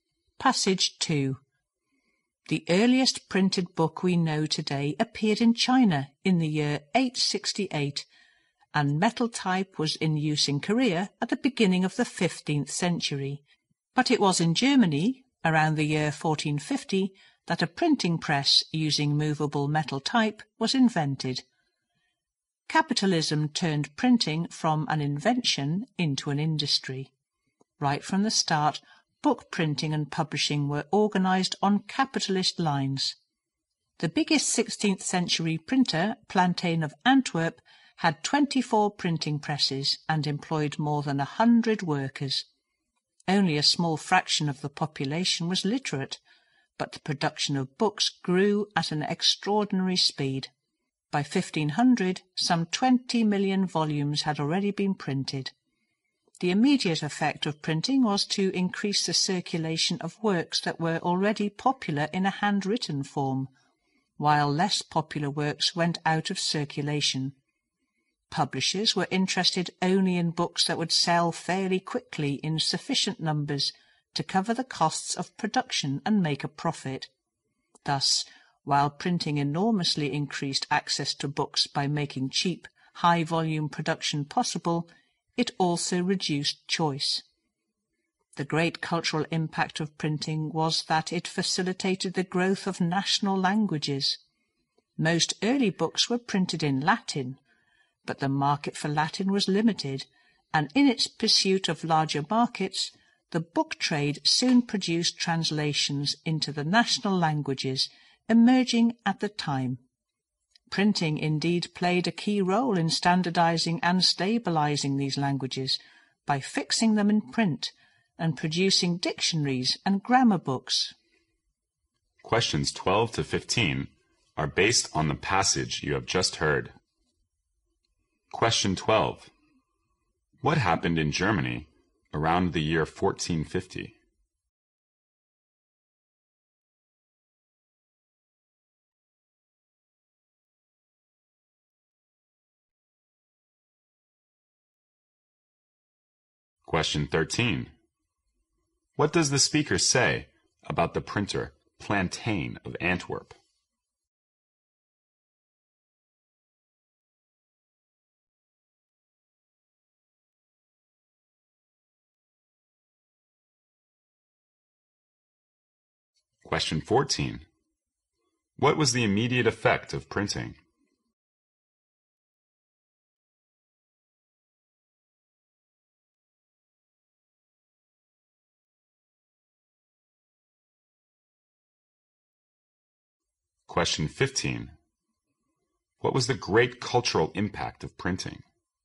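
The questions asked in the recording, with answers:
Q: What happened in Germany around the year 1450?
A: A printing press using movable metal type was invented

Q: What does the speaker say about the printer Plantain of Antwerp?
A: It was the biggest 16th-century printer, with 24 presses and over 100 workers

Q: What was the immediate effect of printing?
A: Works that were already popular circulated more widely, while less popular ones went out of circulation

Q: What was the great cultural impact of printing?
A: It helped national languages grow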